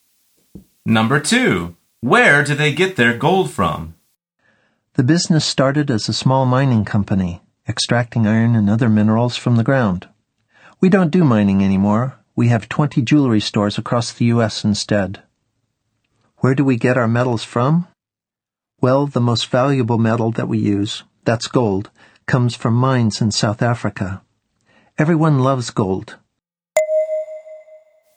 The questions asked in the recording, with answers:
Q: Where do they get their gold from?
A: The answer is South Africa.